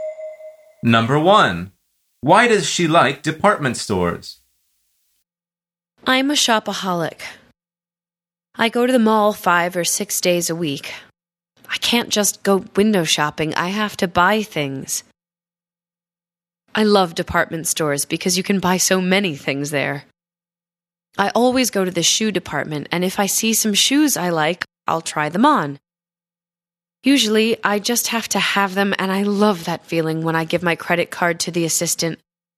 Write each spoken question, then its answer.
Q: Why does she like department stores?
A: The answer is because you can buy so many things there.